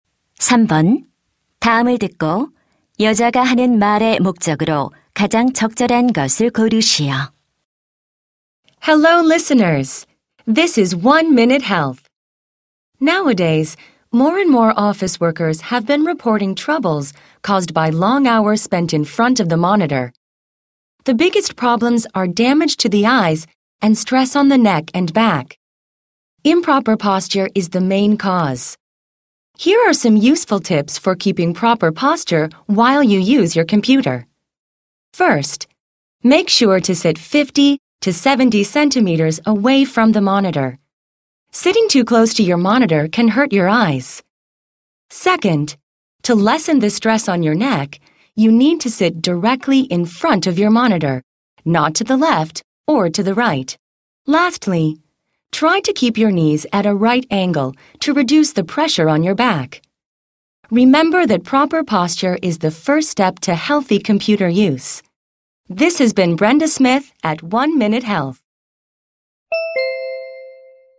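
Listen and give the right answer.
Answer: 컴퓨터 사용 시 올바른 자세 유지 요령을 알려 주려고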